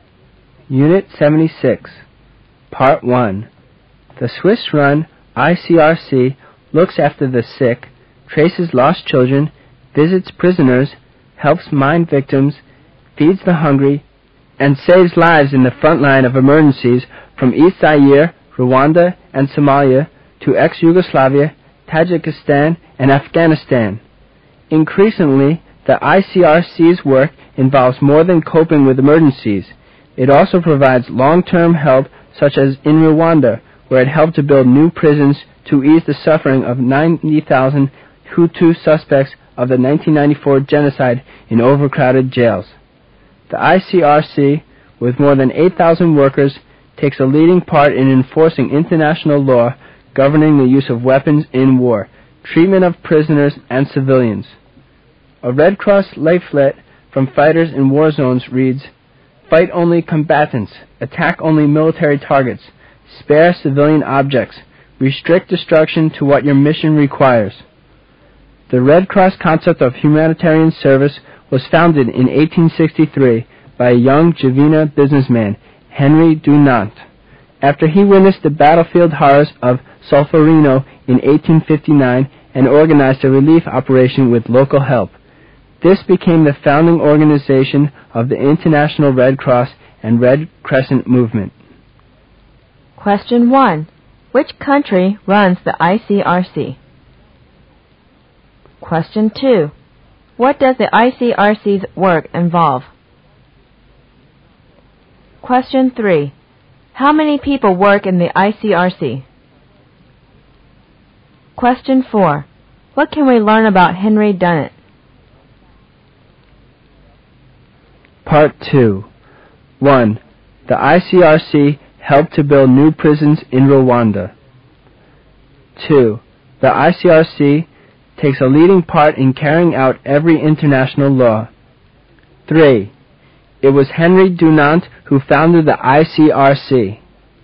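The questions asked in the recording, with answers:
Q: Which country runs the ICRC?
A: Switzerland

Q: What does the ICRC's work involve?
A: Coping with emergencies and long-term help

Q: How many people work in the ICRC?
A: More than 8,000

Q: What can we learn about Henry Dunant?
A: A young Geneva businessman who founded the Red Cross concept in 1863

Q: The ICRC helped to build new prisons in Rwanda.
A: True

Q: The ICRC takes a leading part in carrying out every international law.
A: False

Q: It was Henri Dunant who founded the ICRC.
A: True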